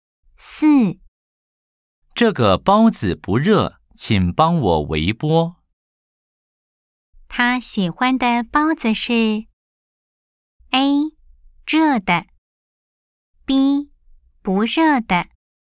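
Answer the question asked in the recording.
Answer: A: 热的。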